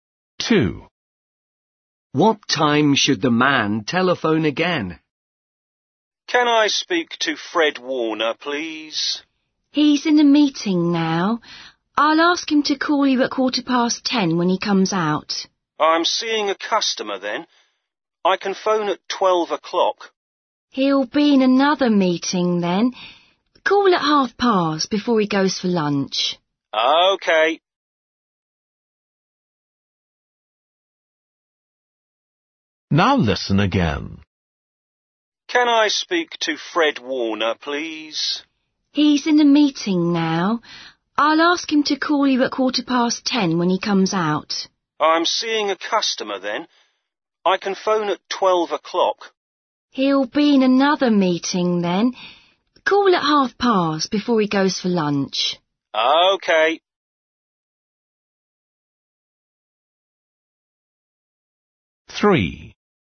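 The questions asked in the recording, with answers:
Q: What time should the man telephone again?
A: 10:30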